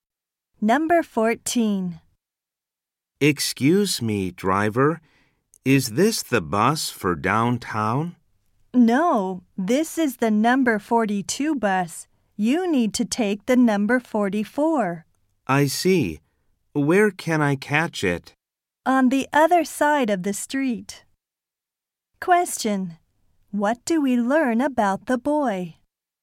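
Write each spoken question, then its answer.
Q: What do we learn about the boy?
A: He is on the wrong bus.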